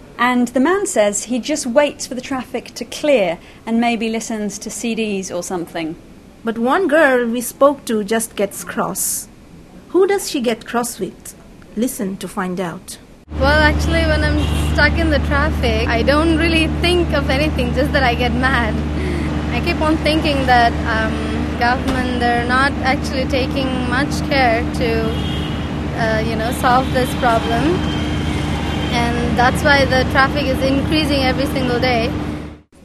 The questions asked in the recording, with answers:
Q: Who does she get cross with?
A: Well, she gets cross with the government because she thinks the government isn't doing enough to sort out the traffic.